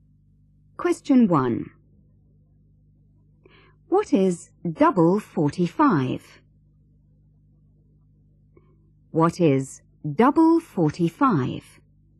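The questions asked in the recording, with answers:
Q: What is double 45?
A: 90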